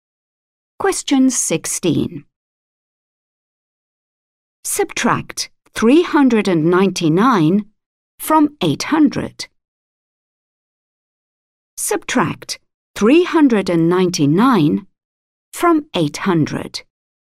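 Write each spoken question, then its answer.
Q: Subtract 399 from 800.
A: 401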